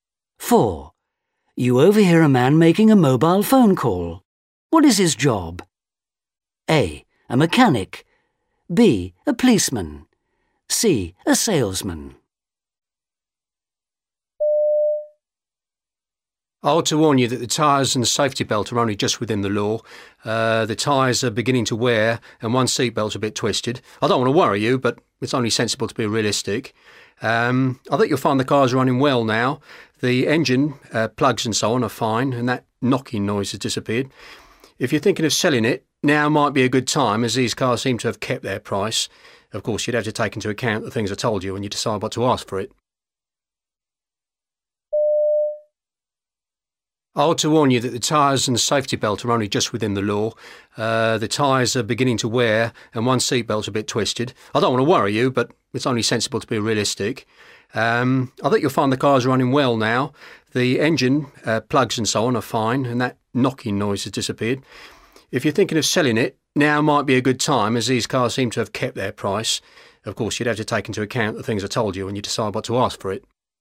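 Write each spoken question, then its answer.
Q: What is his job?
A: A: A mechanic.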